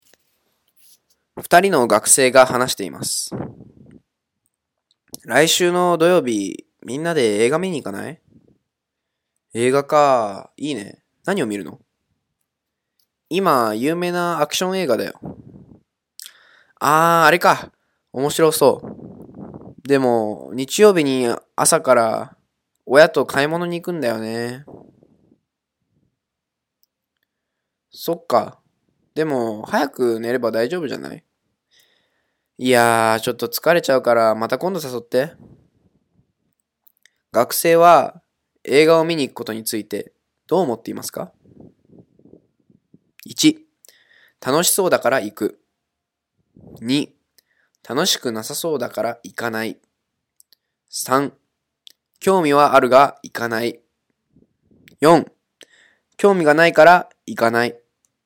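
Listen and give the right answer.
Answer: 3: 興味はあるが行かない。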